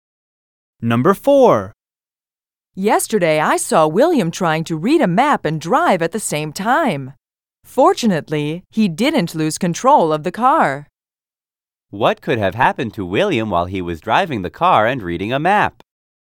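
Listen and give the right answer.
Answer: He could have lost control of the car.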